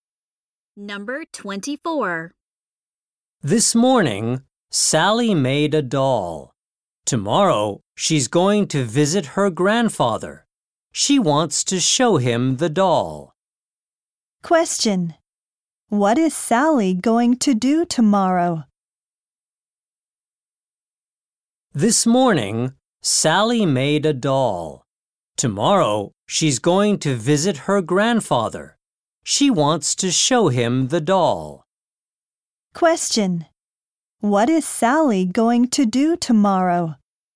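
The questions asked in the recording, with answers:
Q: What is Sally going to do tomorrow?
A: Visit her grandfather.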